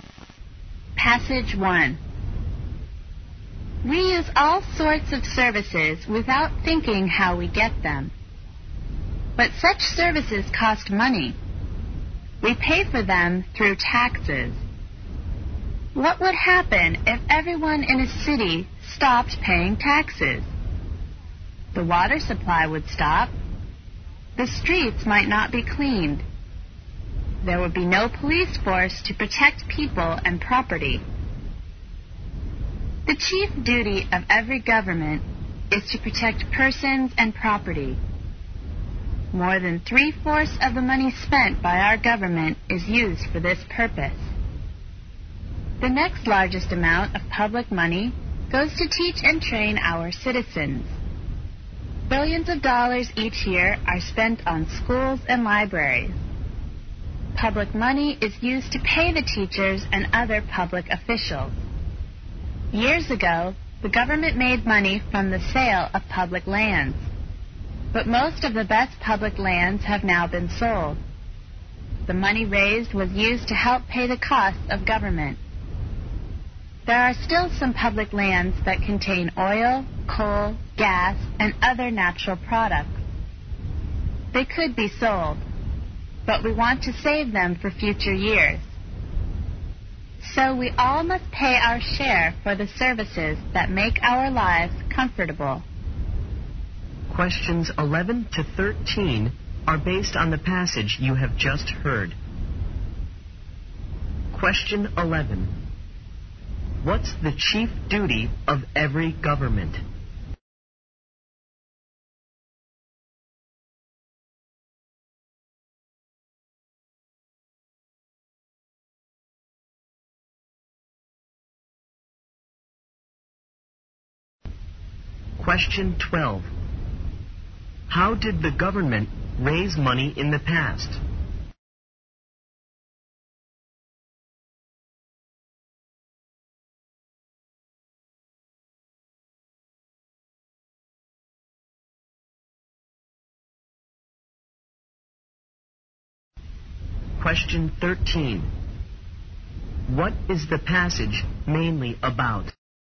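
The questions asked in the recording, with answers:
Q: What's the chief duty of every government?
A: To protect persons and property

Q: How did the government raise money in the past?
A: By selling public lands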